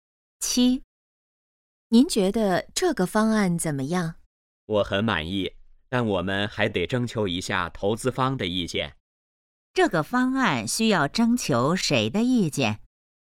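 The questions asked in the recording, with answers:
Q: 这个方案需要征求谁的意见?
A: 投资方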